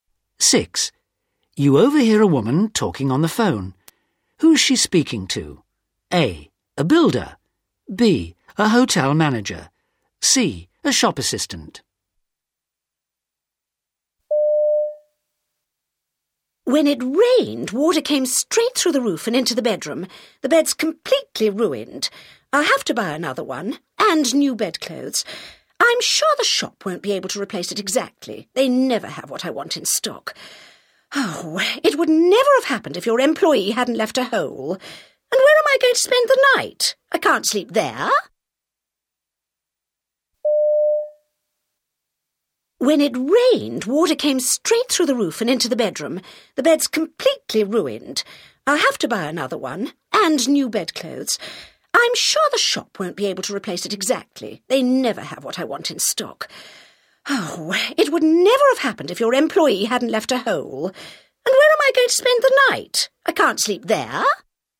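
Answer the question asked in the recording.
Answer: A: A builder.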